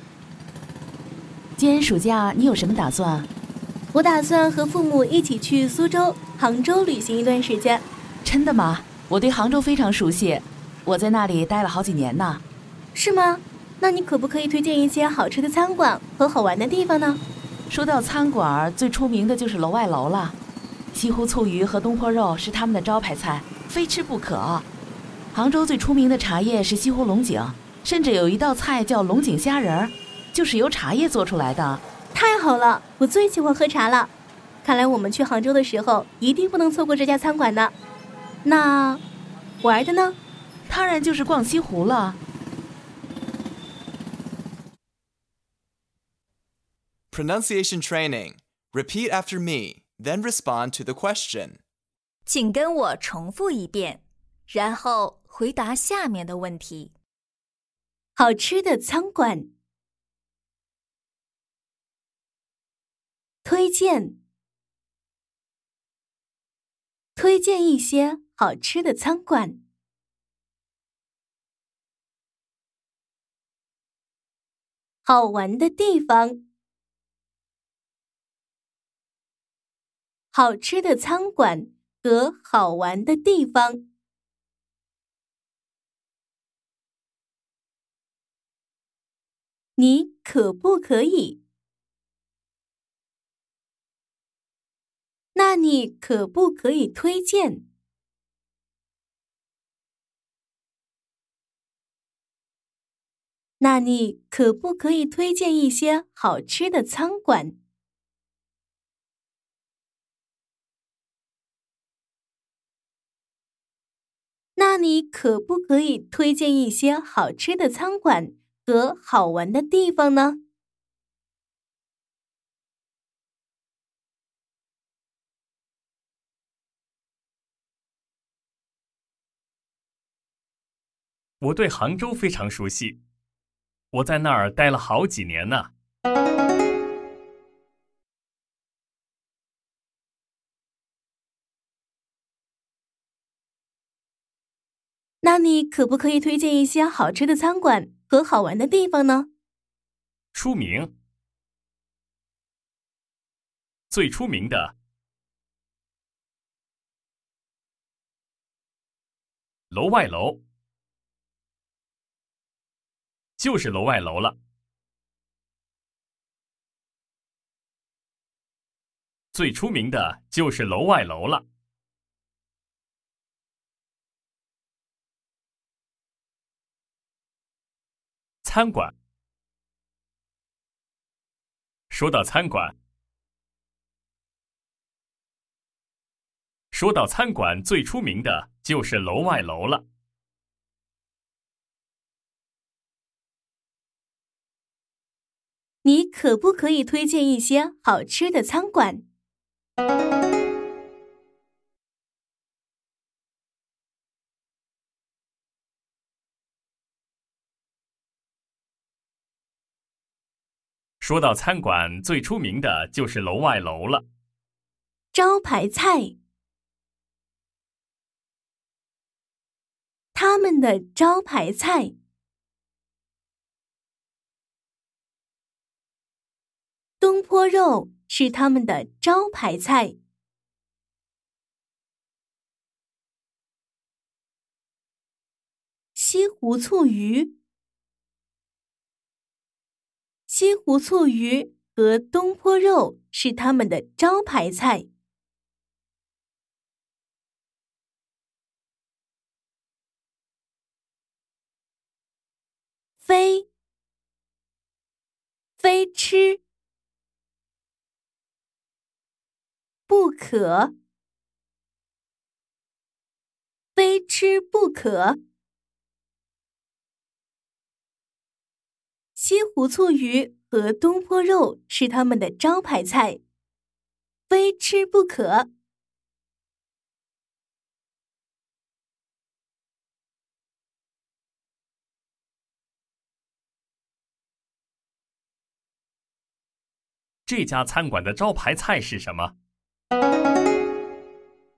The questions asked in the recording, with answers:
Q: 这家餐馆的招牌菜是什么?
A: 西湖醋鱼和东坡肉是他们的招牌菜,非吃不可。